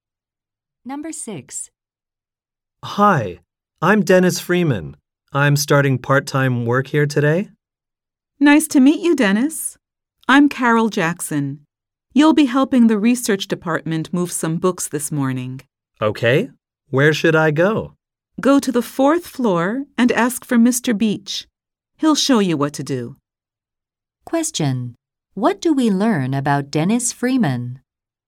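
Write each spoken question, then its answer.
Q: What do we learn about Dennis Freeman?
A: He is starting part-time work today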